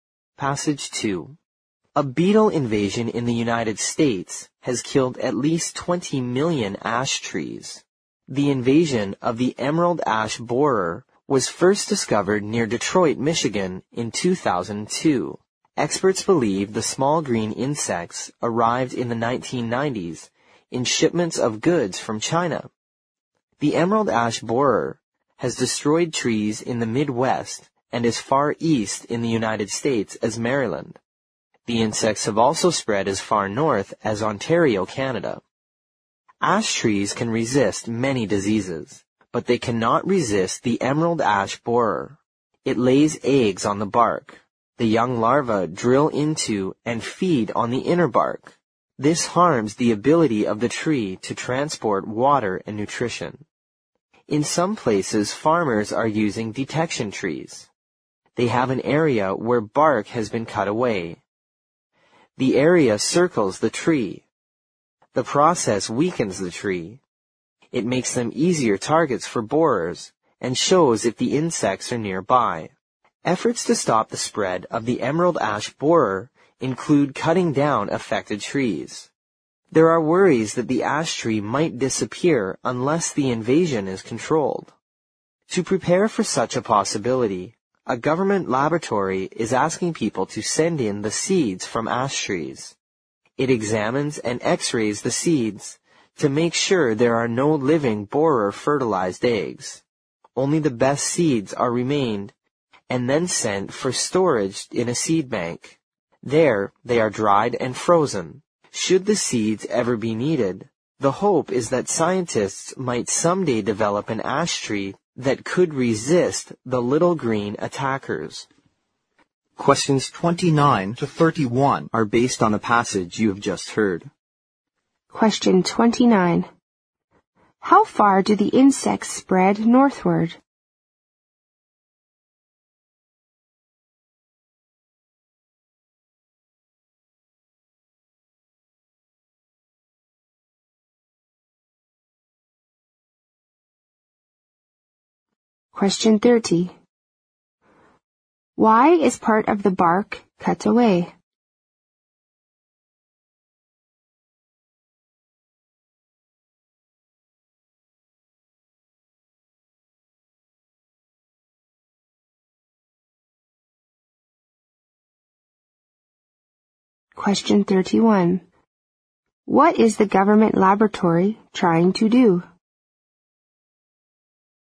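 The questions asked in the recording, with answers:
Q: How far do the insects spread northward?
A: As far north as Ontario, Canada

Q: Why is part of the bark cut away?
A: To weaken the tree so it attracts borers and shows if the insects are nearby

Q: What is the government laboratory trying to do?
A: Collect, check and store ash tree seeds in a seed bank in case ash trees disappear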